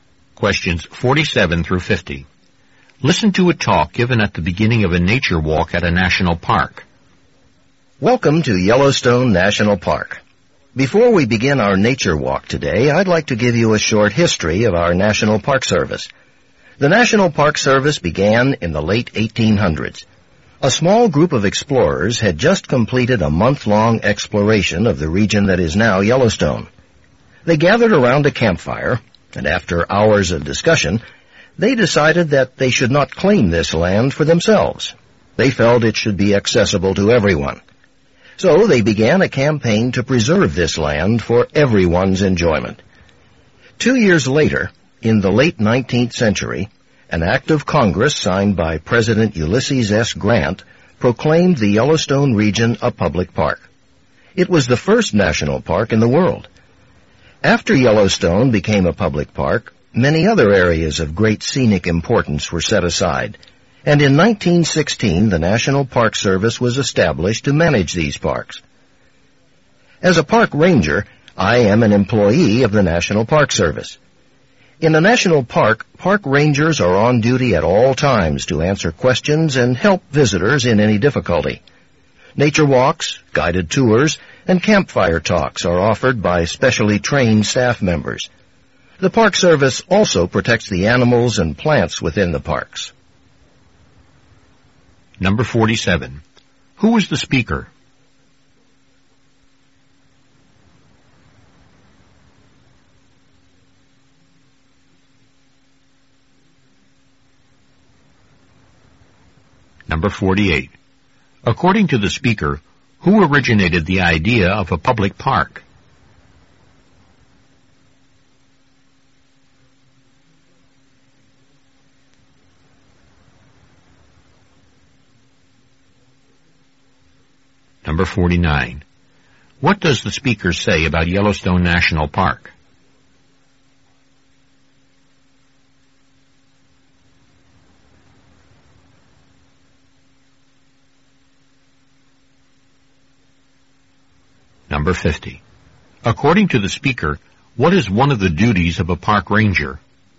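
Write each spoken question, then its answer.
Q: Who was the speaker?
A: A park ranger

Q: According to the speaker, who originated the idea of a public park?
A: A small group of explorers

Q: What does the speaker say about Yellowstone National Park?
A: It was the first national park in the world

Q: According to the speaker, what is one of the duties of a park ranger?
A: To answer visitors' questions and help them in any difficulty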